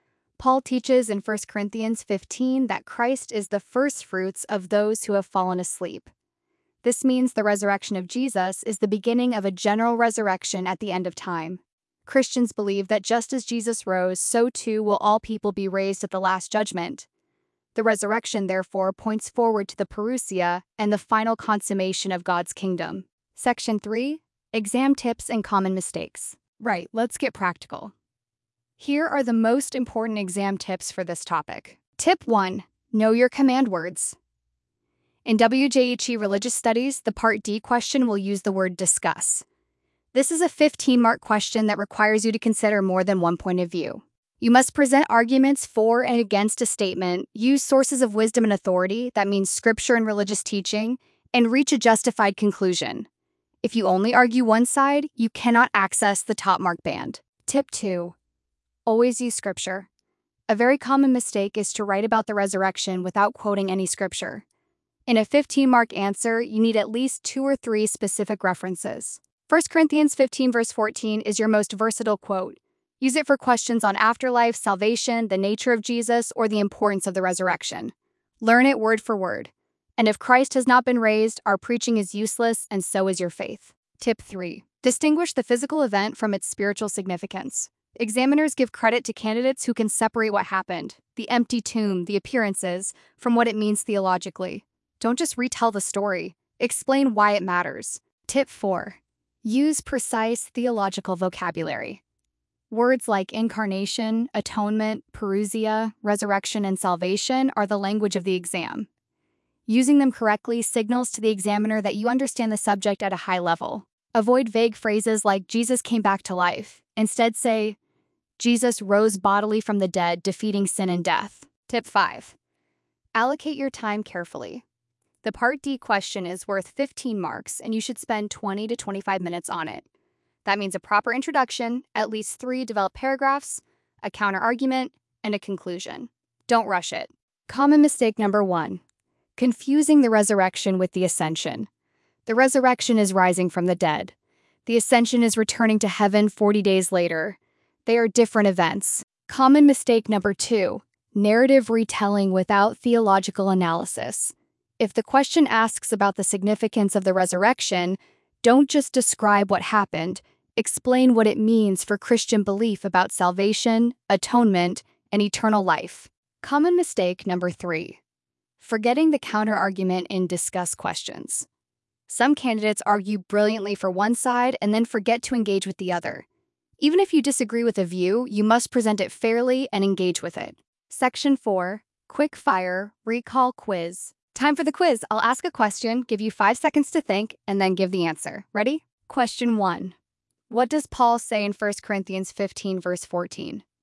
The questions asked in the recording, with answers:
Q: What does Paul say in 1 Corinthians 15 verse 14?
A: The answer is, and if Christ has not been raised, our preaching is useless, and so is your faith.